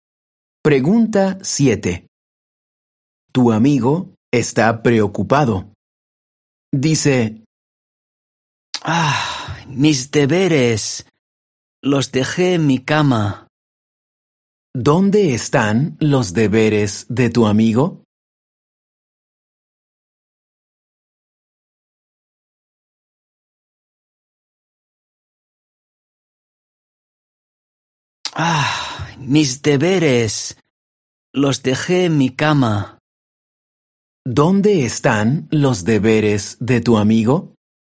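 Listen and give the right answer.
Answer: En su cama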